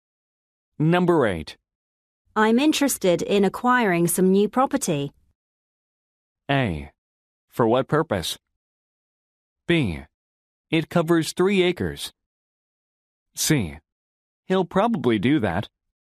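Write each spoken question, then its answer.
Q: I'm interested in acquiring some new property.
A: A: For what purpose?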